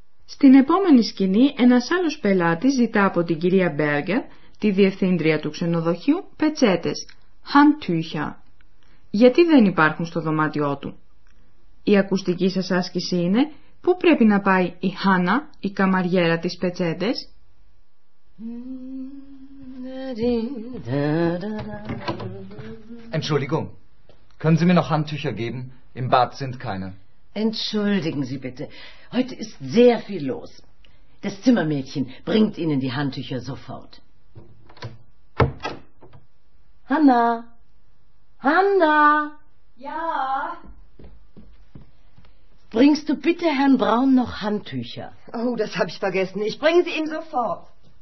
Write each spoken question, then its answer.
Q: Η ακουστική σας άσκηση είναι πού πρέπει να πάει η Χάνα, η καμαριέρα της πετσέτες.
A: Η Χάνα πρέπει να φέρει τις πετσέτες στον κύριο Μπράουν.